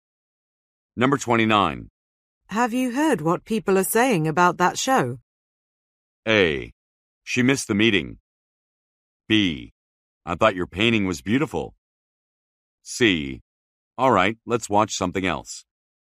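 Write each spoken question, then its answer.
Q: Have you heard what people are saying about that show?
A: C: All right, let's watch something else.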